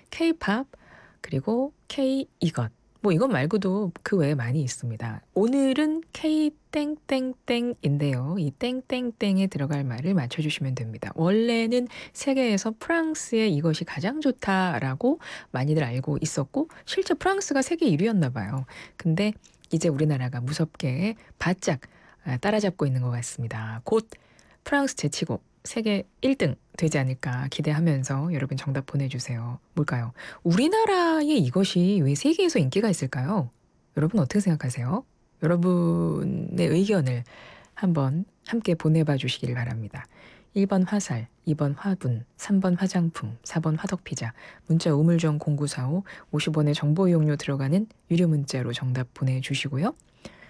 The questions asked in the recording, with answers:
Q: 오늘은 K-땡땡땡인데요. 이 땡땡땡에 들어갈 말을 맞춰주시면 됩니다.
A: K뷰티 최고입니다.